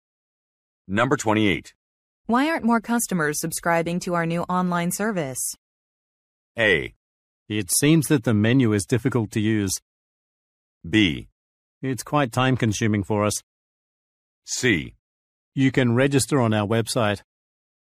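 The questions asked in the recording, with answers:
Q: Why aren't more customers subscribing to our new online service?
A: A: It seems that the menu is difficult to use.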